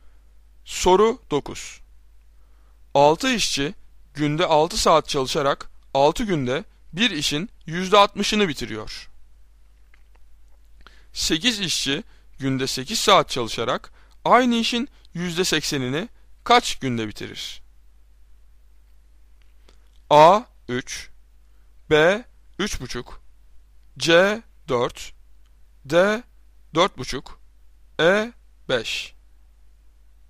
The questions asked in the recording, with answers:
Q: 8 işçi günde 8 saat çalışarak aynı işin %80'ini kaç günde bitirir?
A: Doğru cevap D 4,5.